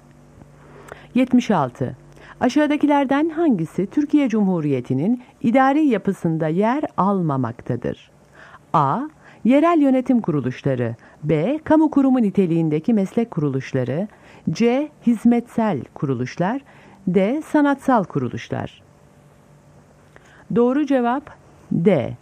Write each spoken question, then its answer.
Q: Aşağıdakilerden hangisi Türkiye Cumhuriyeti'nin idari yapısında yer almamaktadır?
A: Doğru cevap D.